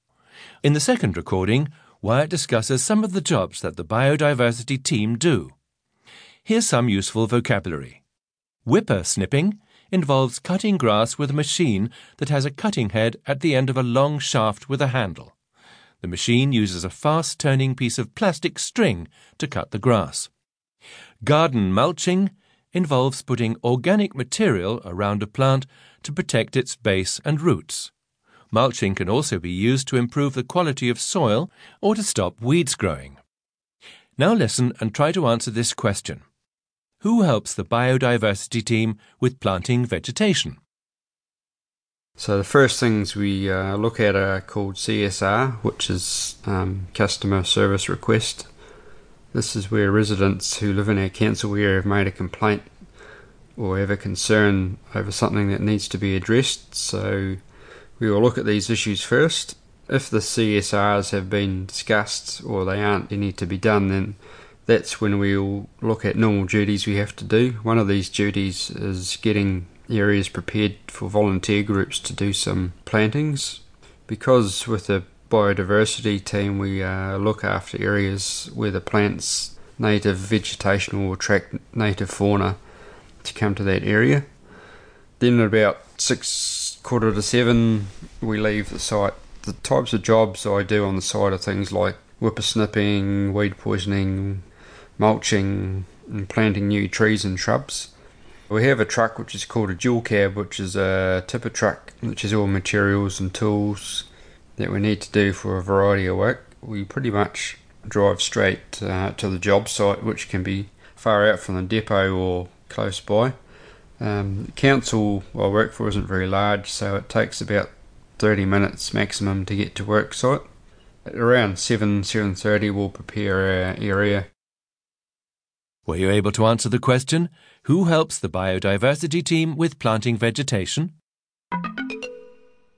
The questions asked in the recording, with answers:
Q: who helps the biodiversity team with planting vegetation.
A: The answer is volunteer groups.